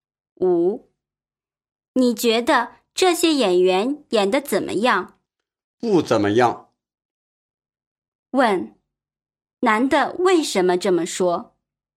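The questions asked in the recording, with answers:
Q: 男的为什么这么说?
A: 他觉得这些演员演得不好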